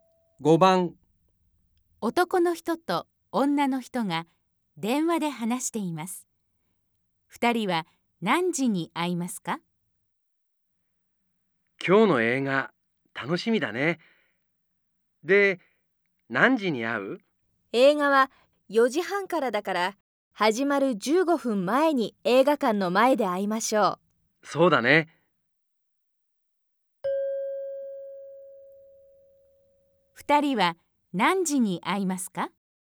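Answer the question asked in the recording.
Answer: 4時15分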